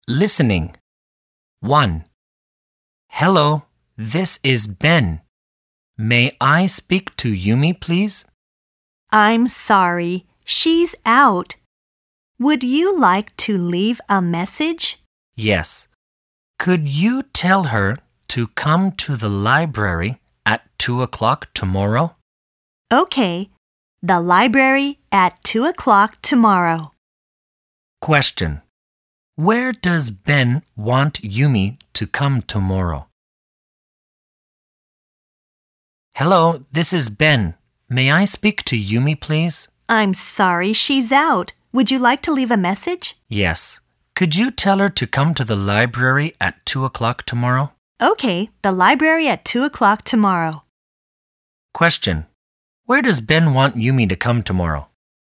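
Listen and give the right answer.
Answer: To the library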